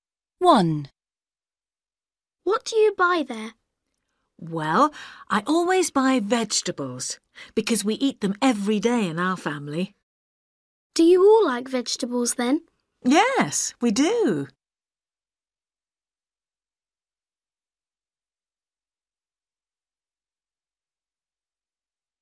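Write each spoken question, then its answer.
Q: What do you buy there?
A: vegetables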